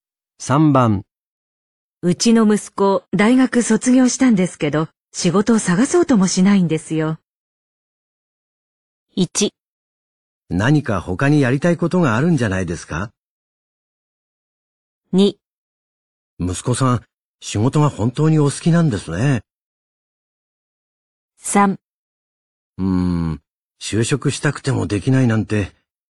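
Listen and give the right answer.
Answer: 1: 何か他にやりたいことがあるんじゃないですか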